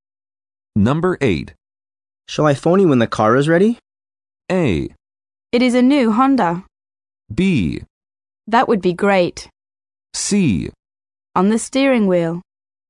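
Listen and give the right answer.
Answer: B: That would be great.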